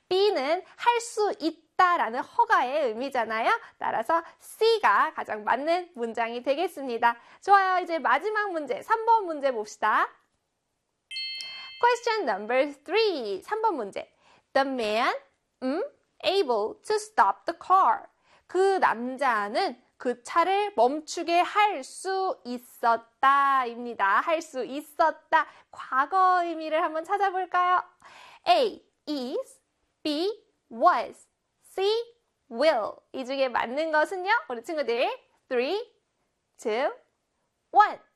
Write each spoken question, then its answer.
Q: The man able to stop the car.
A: 바로 B의 was였습니다.